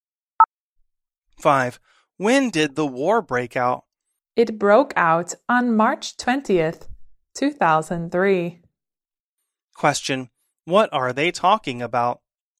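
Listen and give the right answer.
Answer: When the war broke out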